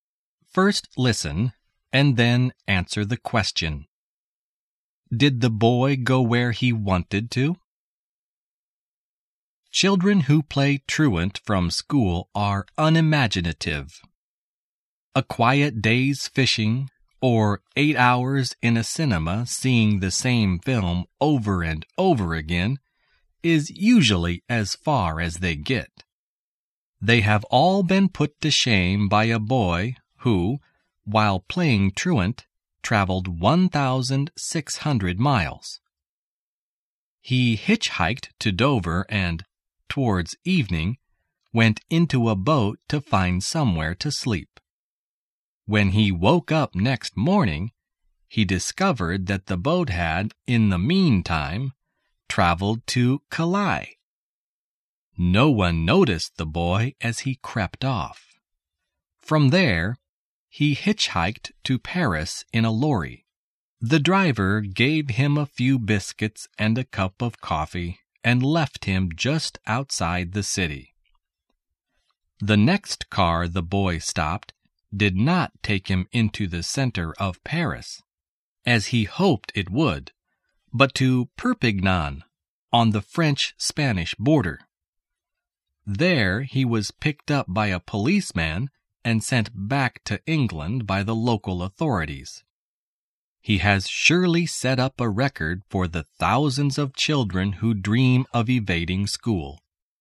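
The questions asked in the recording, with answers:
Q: Did the boy go where he wanted to?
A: No, he wanted to go to Paris but ended up in Perpignan.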